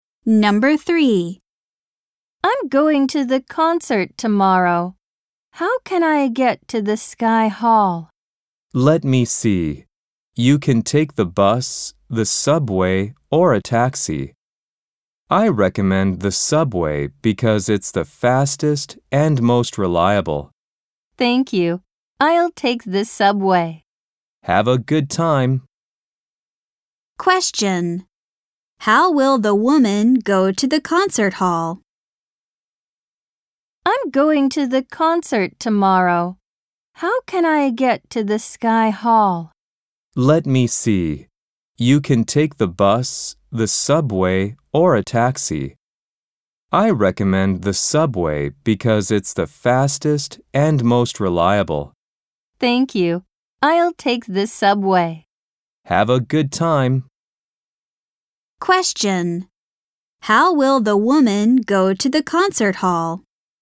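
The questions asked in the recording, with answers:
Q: How will the woman go to the concert hall?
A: By subway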